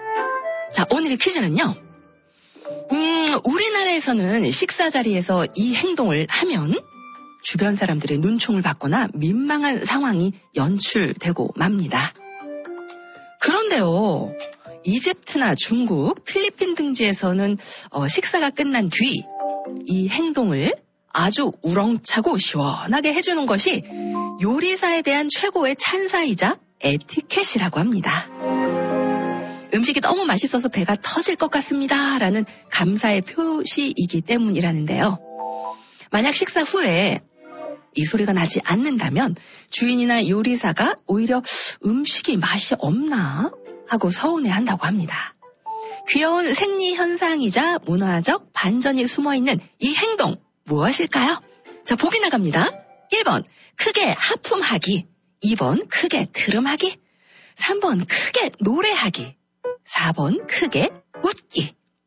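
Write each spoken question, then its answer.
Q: 귀여운 생리 현상이자 문화적 반전이 숨어있는 이 행동 무엇일까요?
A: 2번: 크게 트름하기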